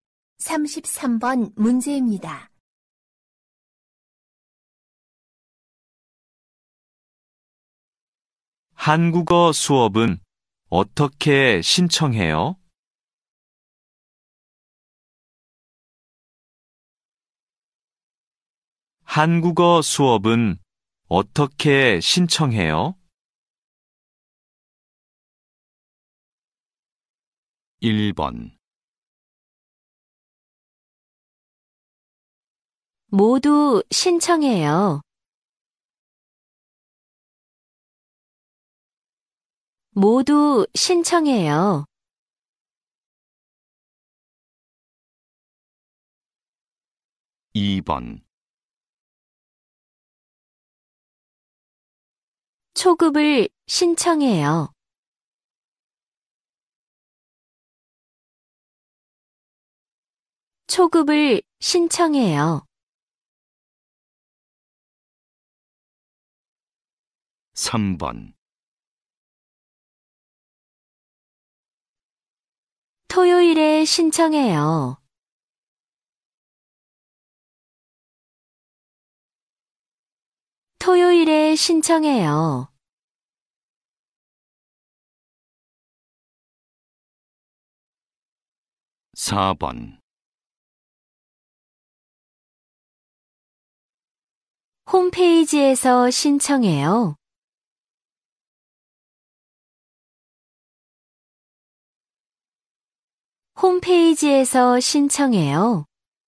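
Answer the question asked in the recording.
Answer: 4: 홈페이지에서 신청해요.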